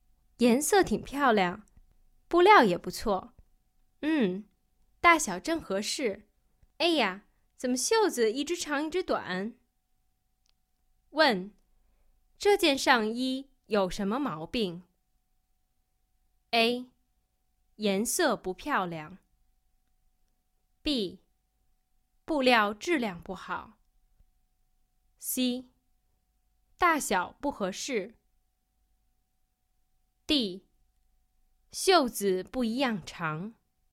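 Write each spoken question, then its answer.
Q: 问,这件上衣有什么毛病?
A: D: 袖子不一样长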